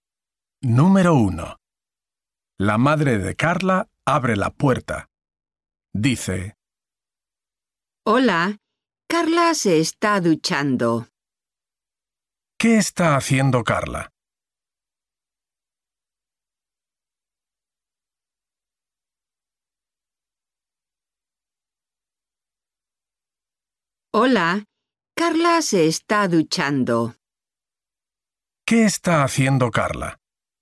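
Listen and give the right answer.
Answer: Se está duchando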